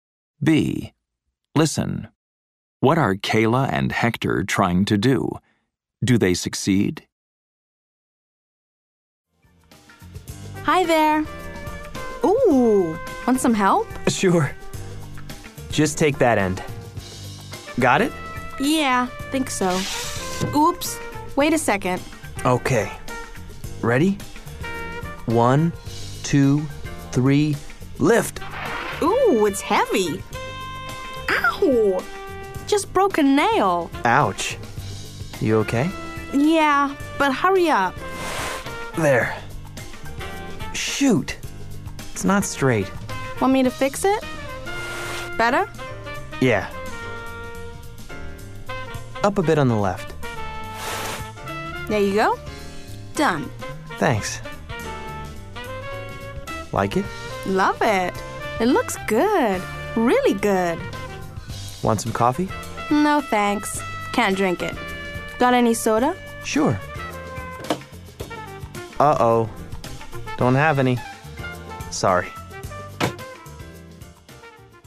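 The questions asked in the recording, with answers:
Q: Do they succeed?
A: Yes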